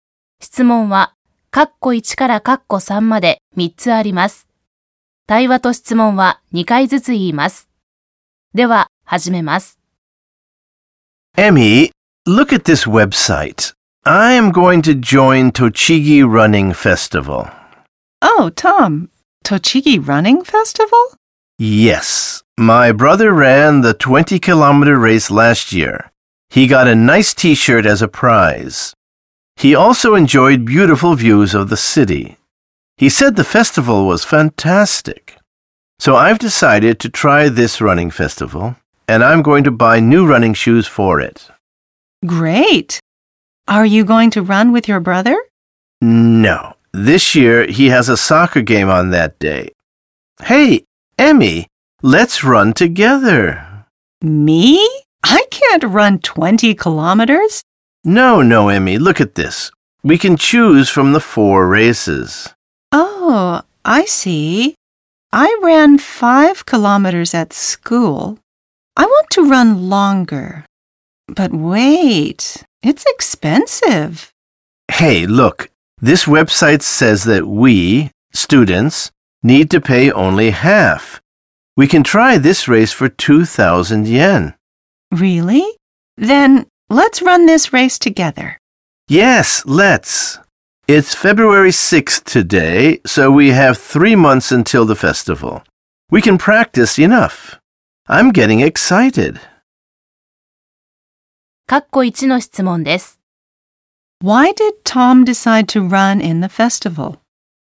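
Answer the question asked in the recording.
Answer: Because his brother said the festival was fantastic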